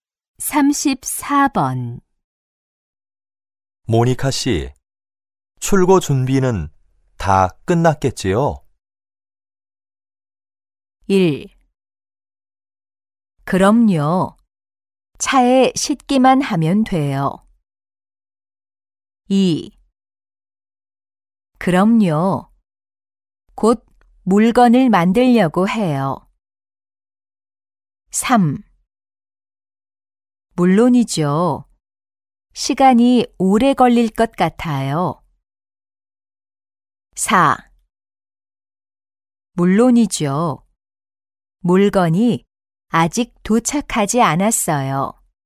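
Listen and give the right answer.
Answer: 1: 그럼요. 차에 싣기만 하면 돼요.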